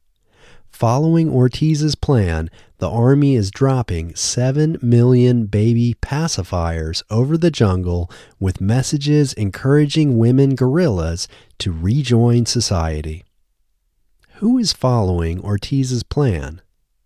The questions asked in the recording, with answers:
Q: Who is following Ortiz's plan?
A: The Army is following Ortiz's plan.